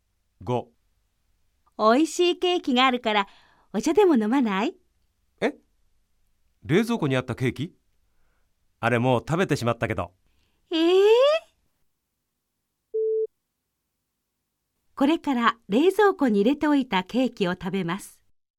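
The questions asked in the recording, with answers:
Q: これから冷蔵庫に入れておいたケーキを食べます。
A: ×(正しくない)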